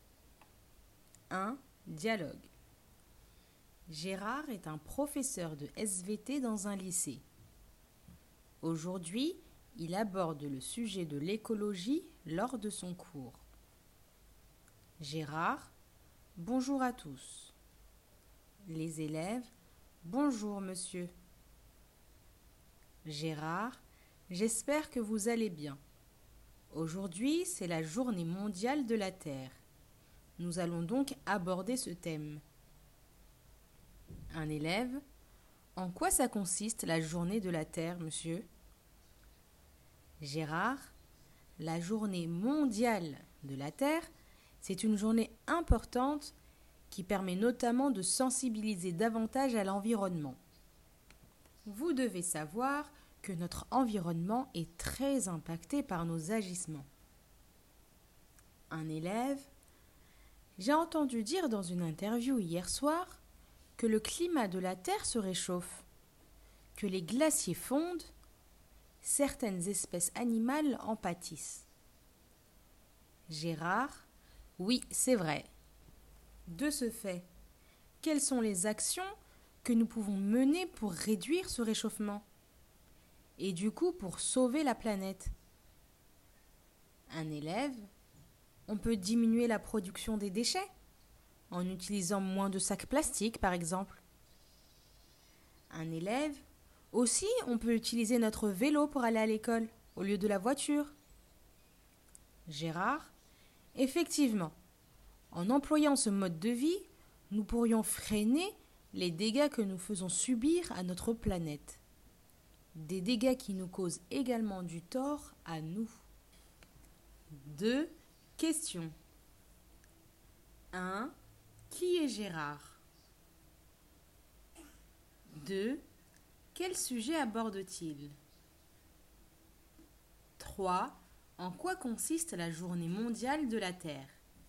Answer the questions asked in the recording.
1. C'est un professeur de SVT.
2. Il aborde le sujet de l'écologie.
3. Elle consiste à sensibiliser les gens à l'environnement.